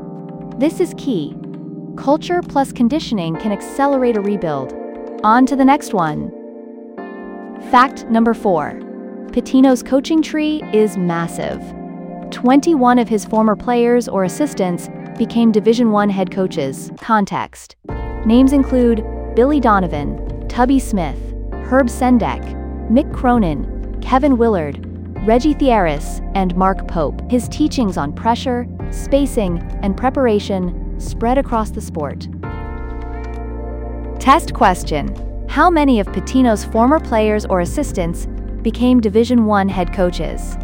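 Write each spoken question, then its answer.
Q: How many of Pitino's former players or assistants became Division I head coaches?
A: 21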